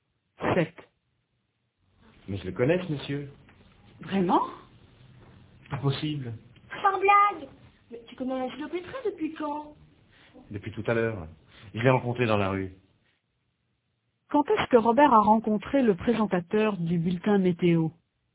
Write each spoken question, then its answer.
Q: Quand est-ce que Robert a rencontré le présentateur du bulletin météo?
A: Tout à l'heure.